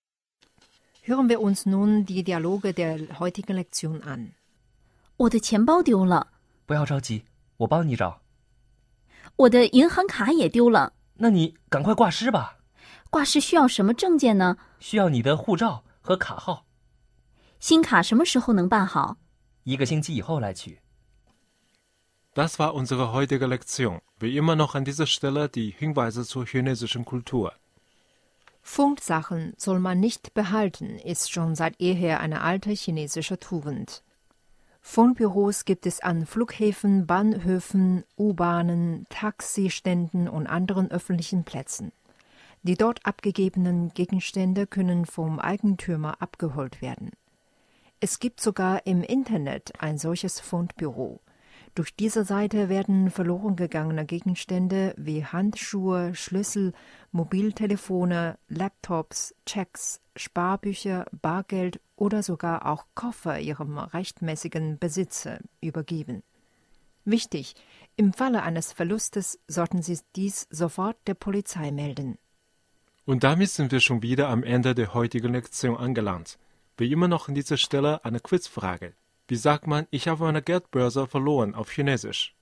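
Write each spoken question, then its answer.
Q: Wie sagt man, ich habe meine Geldbörse verloren auf Chinesisch?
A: 我的钱包丢了。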